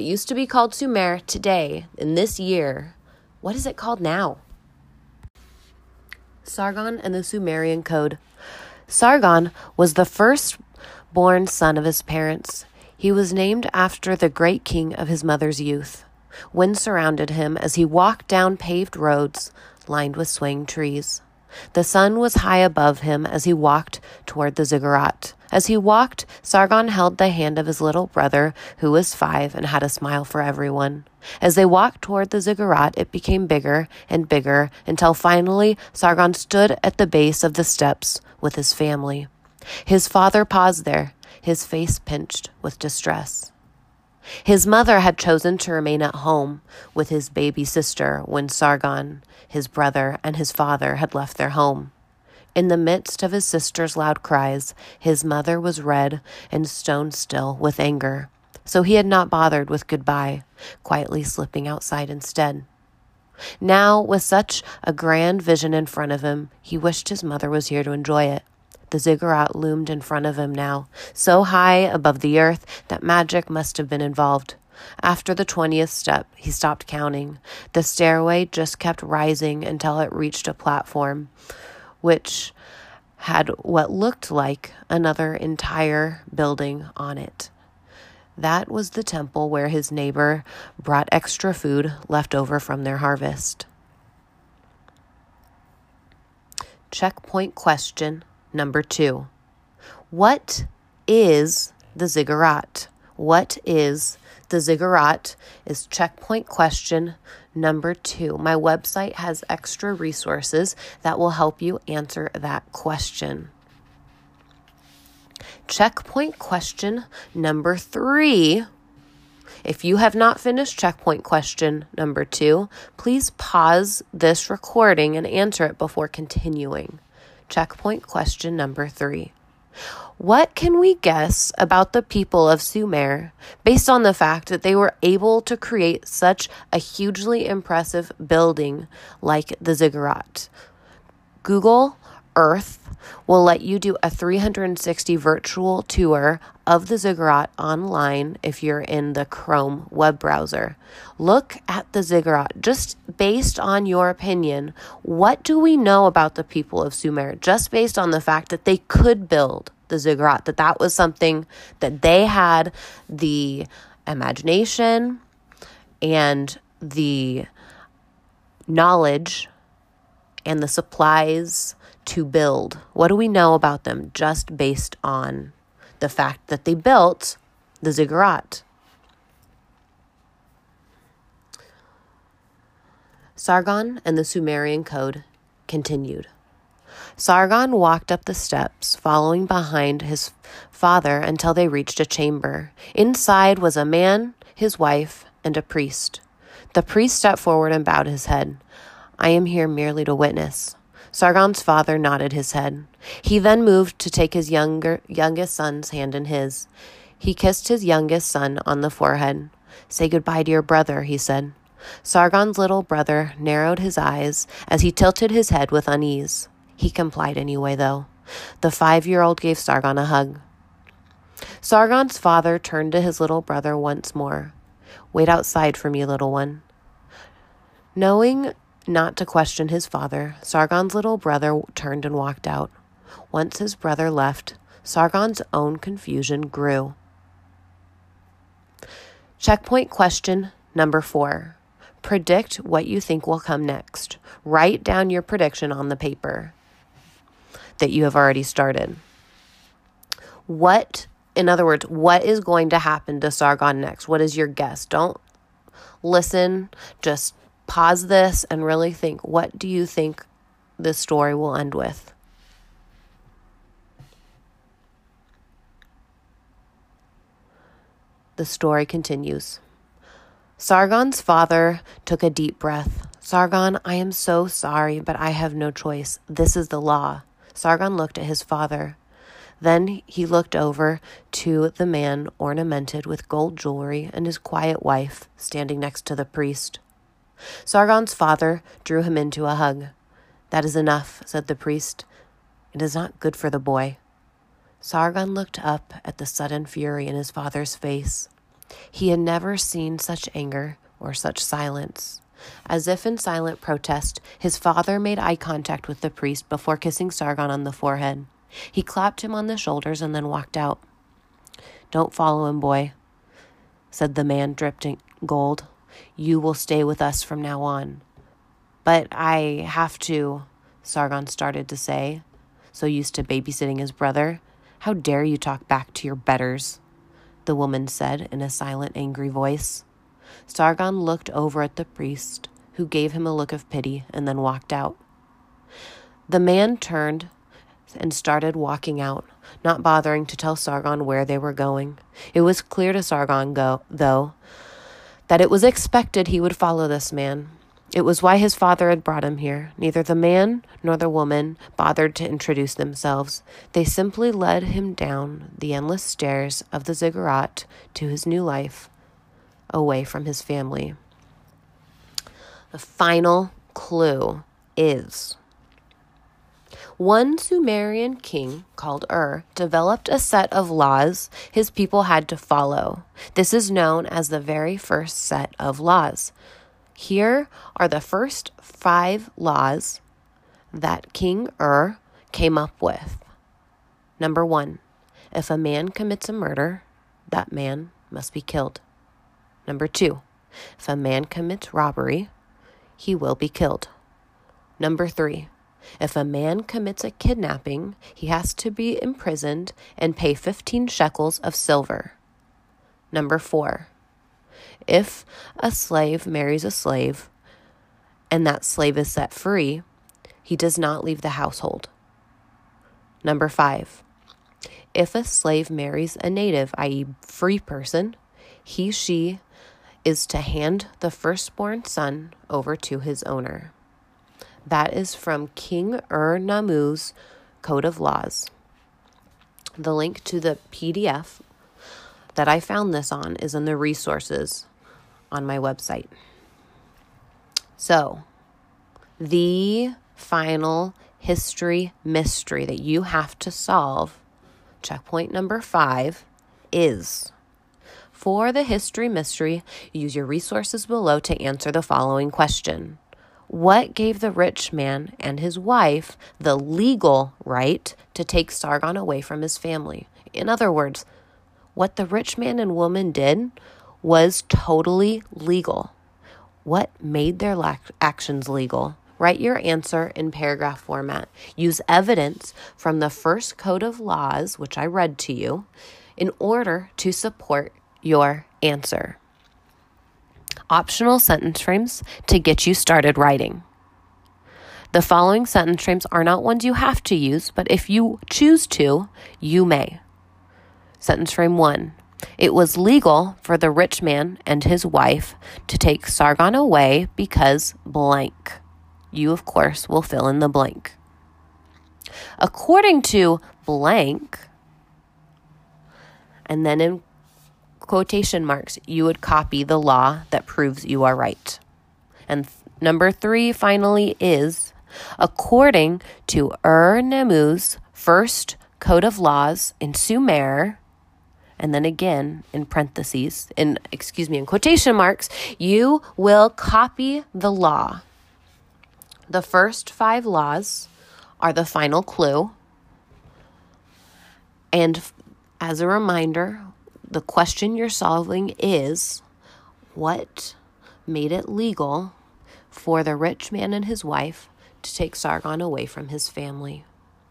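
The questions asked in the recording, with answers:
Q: What gave the rich man and his wife the legal right to take Sargon away from his family?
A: Ur-Nammu's law number 5: if a slave marries a free person, the firstborn son must be handed over to the owner, and Sargon was the firstborn son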